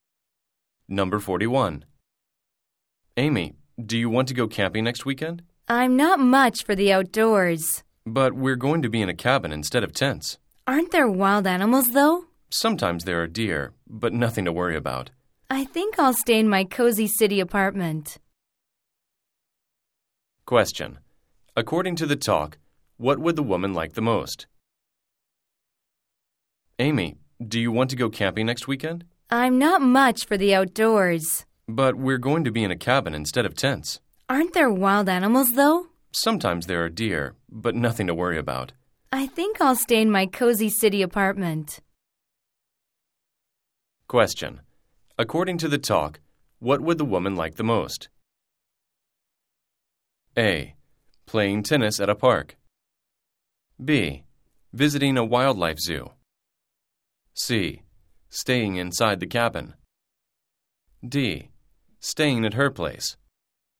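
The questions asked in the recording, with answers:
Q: According to the talk, what would the woman like the most?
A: D: Staying at her place.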